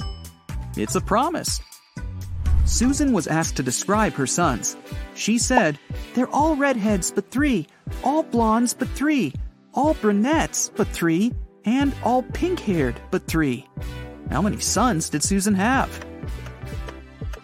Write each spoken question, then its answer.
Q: How many sons did Susan have?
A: The answer is four.